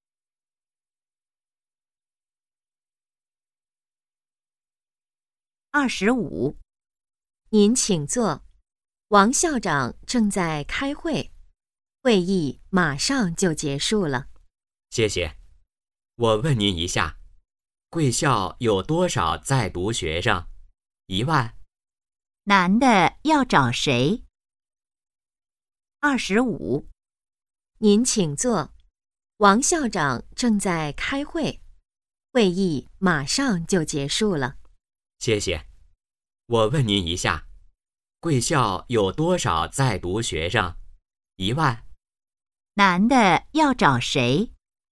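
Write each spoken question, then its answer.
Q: 男的要找谁?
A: 王校长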